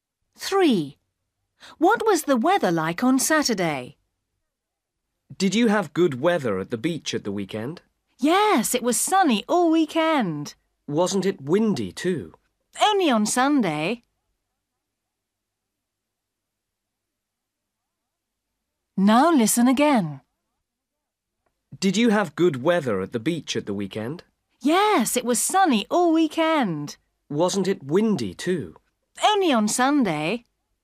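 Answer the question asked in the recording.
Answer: Sunny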